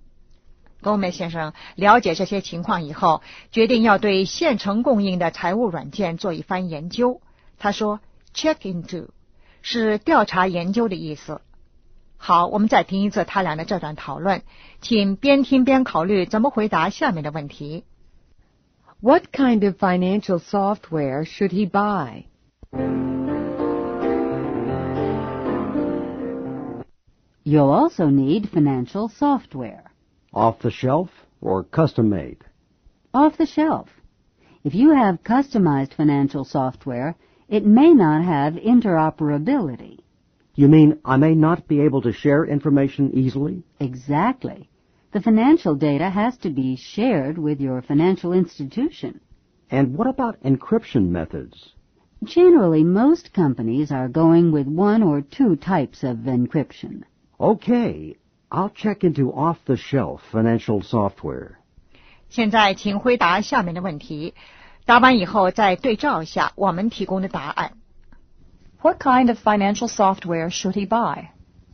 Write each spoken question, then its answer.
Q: What kind of financial software should he buy?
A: Off-the-shelf software.